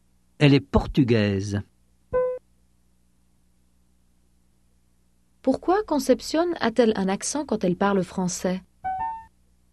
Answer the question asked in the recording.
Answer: Parce qu'elle est portugaise.